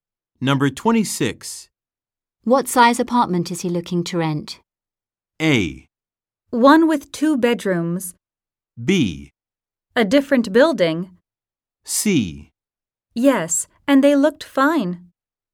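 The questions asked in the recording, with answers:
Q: What size apartment is he looking to rent?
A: A: One with two bedrooms.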